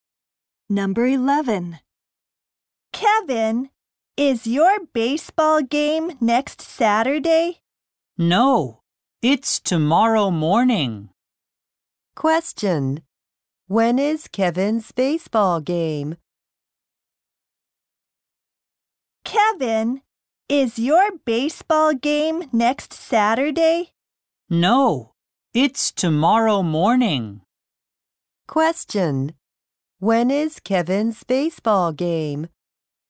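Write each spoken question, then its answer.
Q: When is Kevin's baseball game?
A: Tomorrow morning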